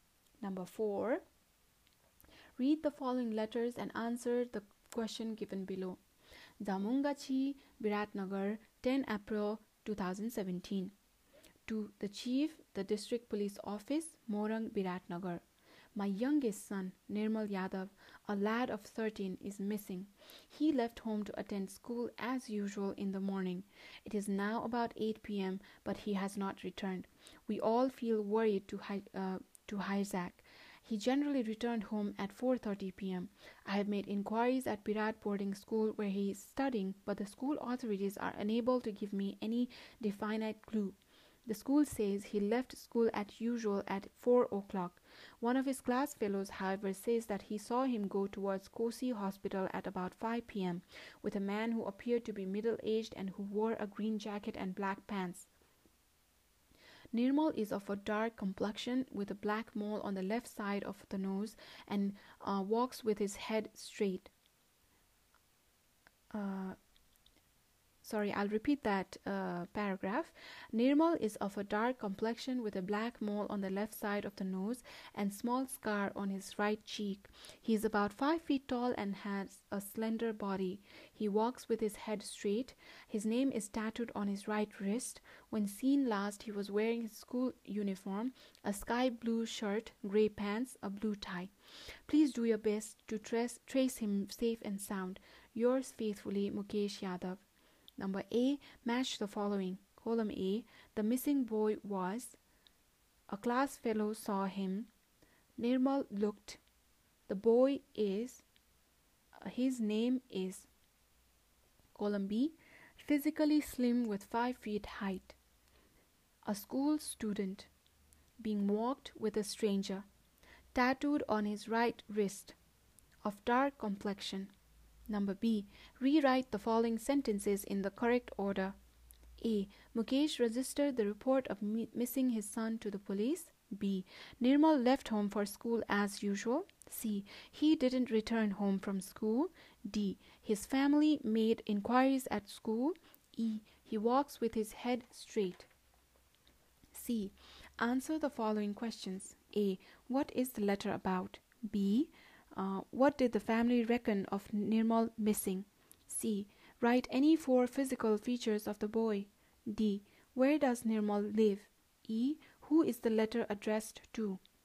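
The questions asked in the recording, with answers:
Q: What is the letter about?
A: His missing son, Nirmal Yadav

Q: Where does Nirmal live?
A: Zamungachi, Biratnagar

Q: Who is the letter addressed to?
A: The Chief, the District Police Office, Morang, Biratnagar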